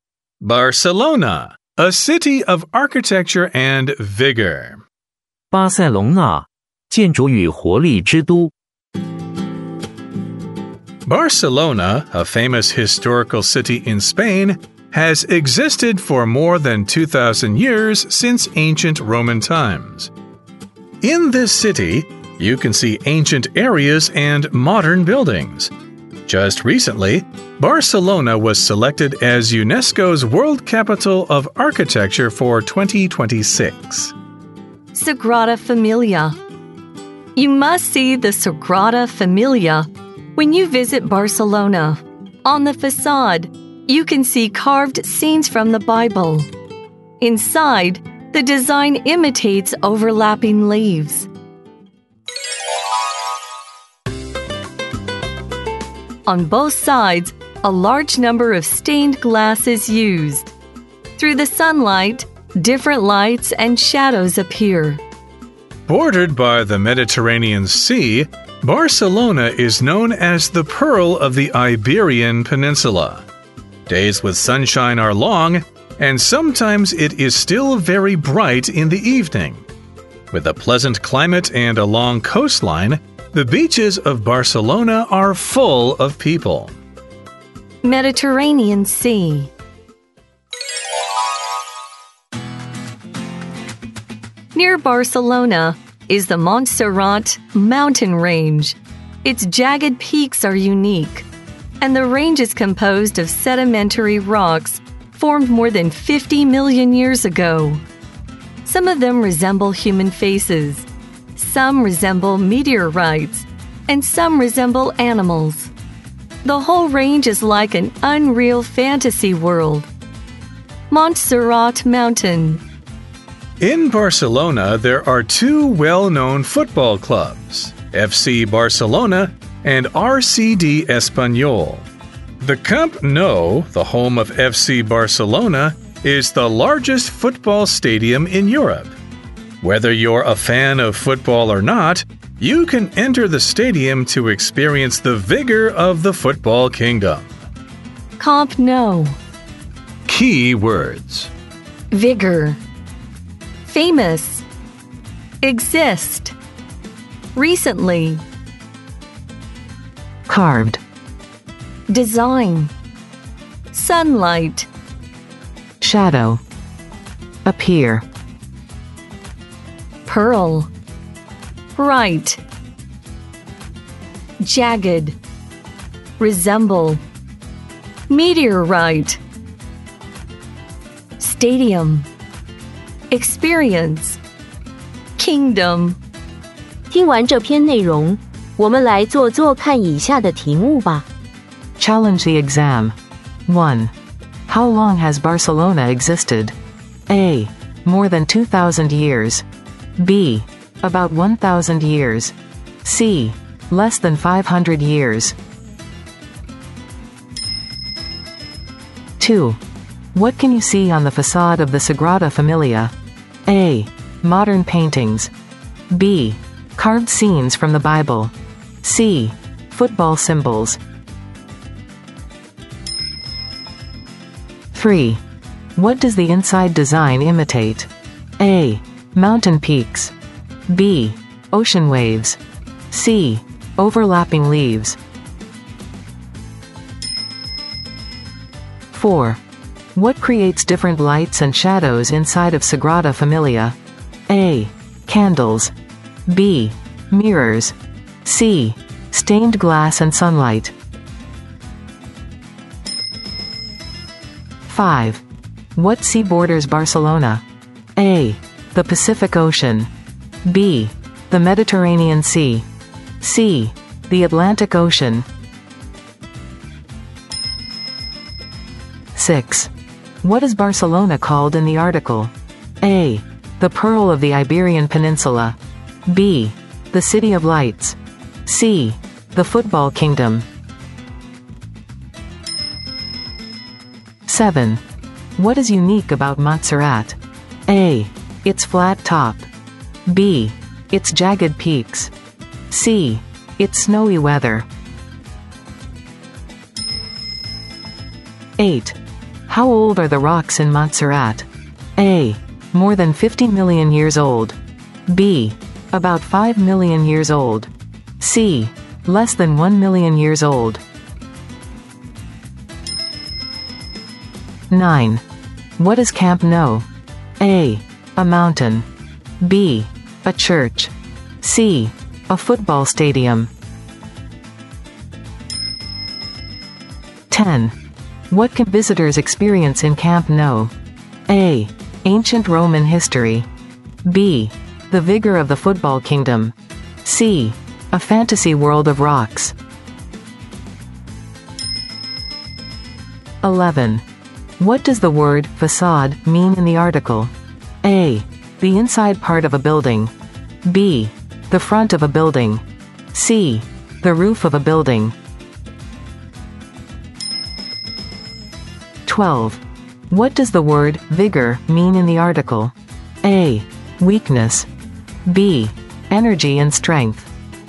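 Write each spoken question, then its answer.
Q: How long has Barcelona existed?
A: A: More than 2,000 years.

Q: What can you see on the facade of the Sagrada Familia?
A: B: Carved scenes from the Bible.

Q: What does the inside design imitate?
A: C: Overlapping leaves.

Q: What creates different lights and shadows inside of Sagrada Familia?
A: C: Stained glass and sunlight.

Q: What sea borders Barcelona?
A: B: The Mediterranean Sea.

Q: What is Barcelona called in the article?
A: A: The Pearl of the Iberian Peninsula.

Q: What is unique about Montserrat?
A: B: Its jagged peaks.

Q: How old are the rocks in Montserrat?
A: A: More than 50 million years old.

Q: What is Camp Nou?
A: C: A football stadium.

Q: What can visitors experience in Camp Nou?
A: B: The vigor of the football kingdom.

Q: What does the word facade mean in the article?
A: B: The front of a building.

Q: What does the word vigor mean in the article?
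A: B: Energy and strength.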